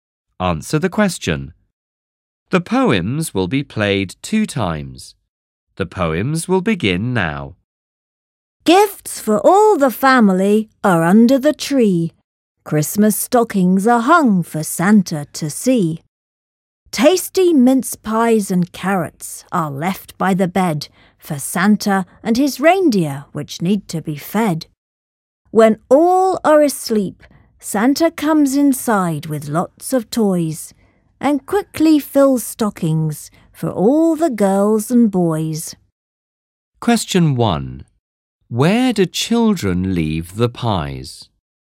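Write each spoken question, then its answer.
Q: Where do children leave the pies?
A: By the bed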